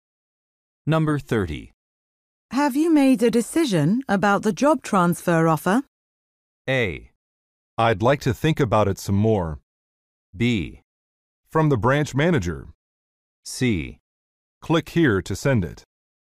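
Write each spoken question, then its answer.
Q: Have you made a decision about the job transfer offer?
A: A: I'd like to think about it some more.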